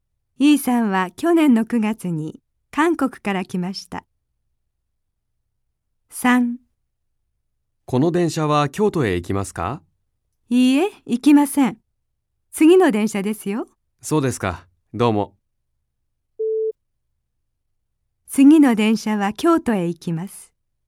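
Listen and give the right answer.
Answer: ○(正しい)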